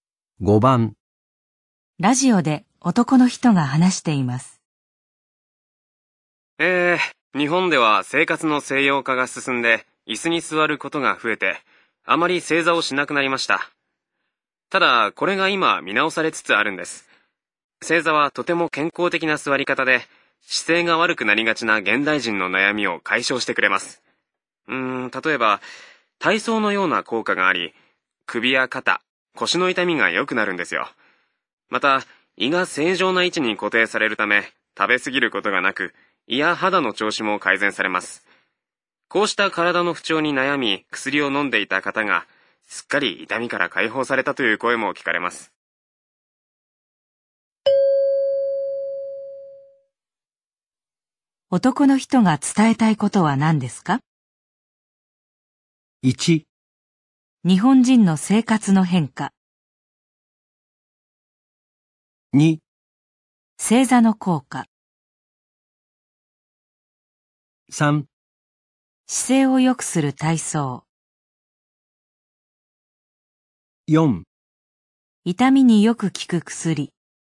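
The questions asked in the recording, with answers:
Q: 男の人が伝えたいことは何ですか?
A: 2: 正座の効果。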